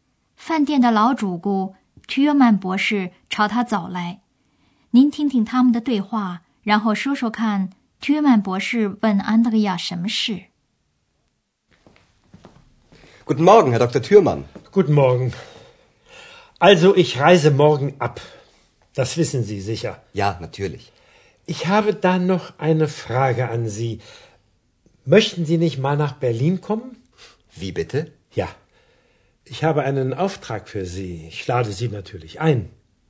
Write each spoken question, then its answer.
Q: 说说看 Thürmann 博士问 Andreas 什么事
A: 他问 Andreas 是不是想到柏林来。